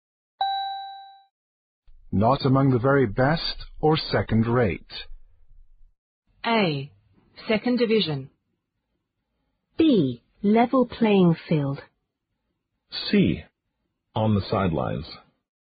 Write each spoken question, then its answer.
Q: Not among the very best or second rate.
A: The answer is A. Second division.